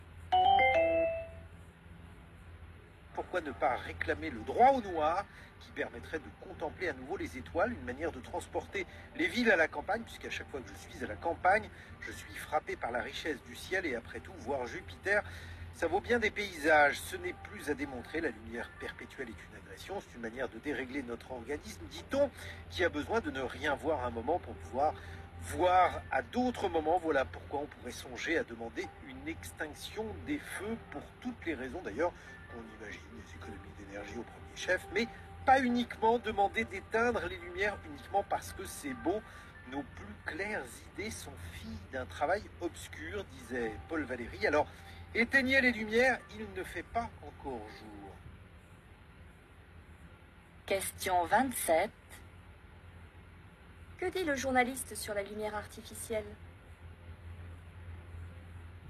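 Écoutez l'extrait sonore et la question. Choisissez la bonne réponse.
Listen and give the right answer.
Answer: Elle est une agression qui dérègle notre organisme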